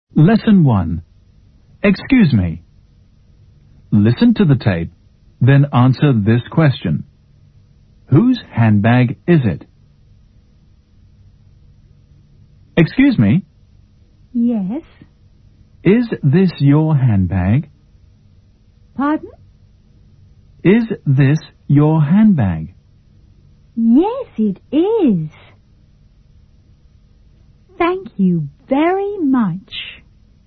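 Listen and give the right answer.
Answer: It belongs to the person who was asked (the woman who says "Yes, it is").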